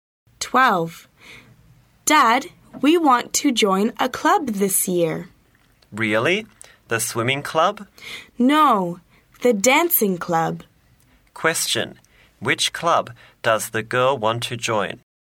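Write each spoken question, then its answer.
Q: Which club does the girl want to join?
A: The dancing club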